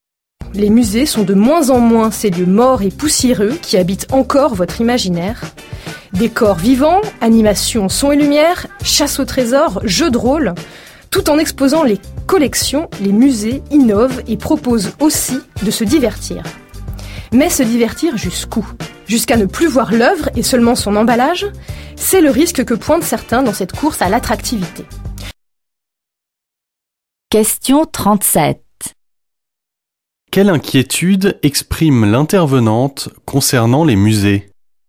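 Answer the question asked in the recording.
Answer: Que le divertissement prenne le dessus et qu'on ne voie plus l'œuvre, seulement son emballage.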